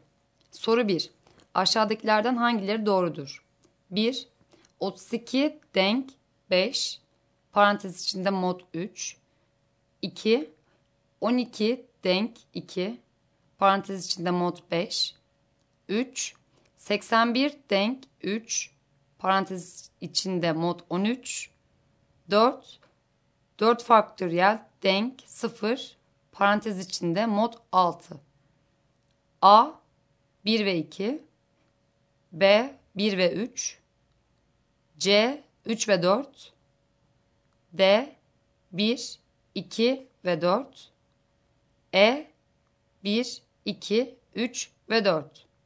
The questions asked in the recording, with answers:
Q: Aşağıdakilerden hangileri doğrudur?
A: Doğru cevap E şıkkı.